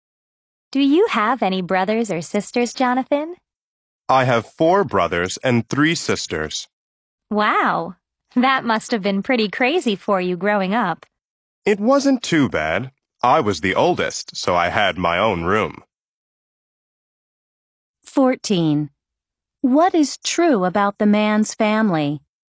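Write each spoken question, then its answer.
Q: What is true about the man's family?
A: He is the oldest of eight children (4 brothers and 3 sisters)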